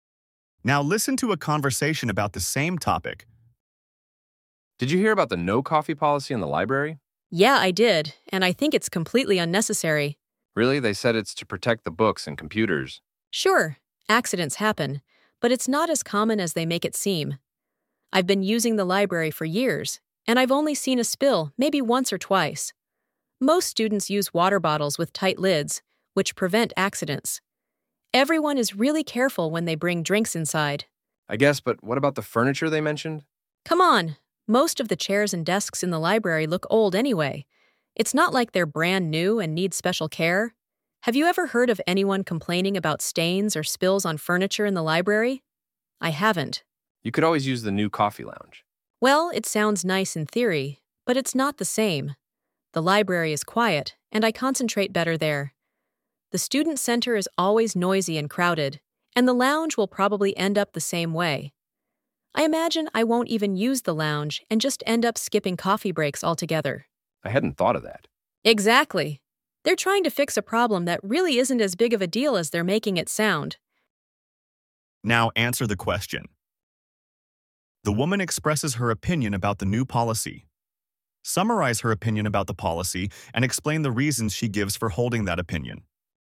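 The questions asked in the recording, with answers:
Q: Summarize her opinion about the policy and explain the reasons she gives for holding that opinion.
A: She thinks the no-coffee policy is unnecessary: spills are rare and students are careful and use lidded bottles; the furniture is already old; and the new lounge will be noisy like the student center, so she can't concentrate there and will just skip coffee breaks.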